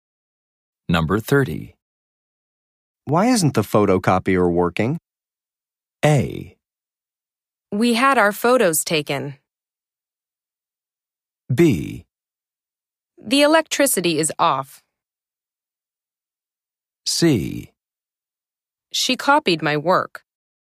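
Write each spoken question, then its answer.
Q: Why isn't the photocopier working?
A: B: The electricity is off.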